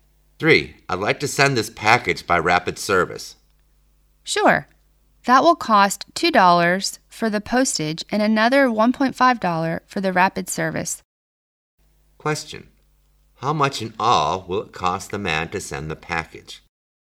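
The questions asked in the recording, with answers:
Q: How much in all will it cost the man to send the package?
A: $3.50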